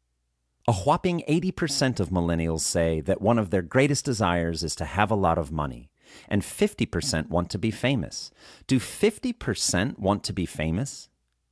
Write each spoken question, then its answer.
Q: Do 50% want to be famous?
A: Yes, 50% want to be famous.